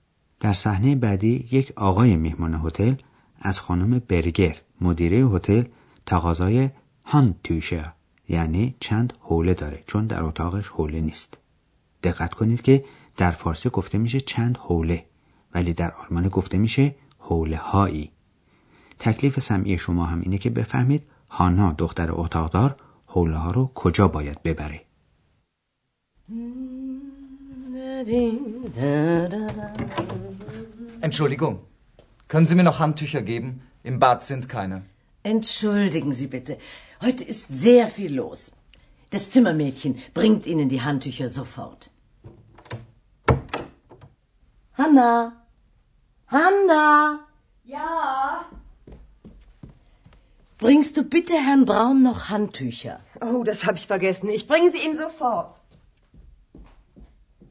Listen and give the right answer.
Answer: پس هانا باید حوله ها رو به اتاق آقای براون ببره.